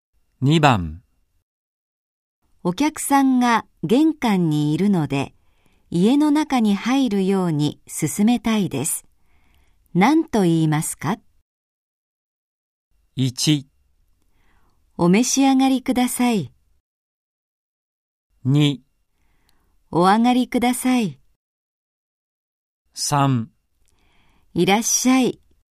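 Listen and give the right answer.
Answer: 2: お上がりください。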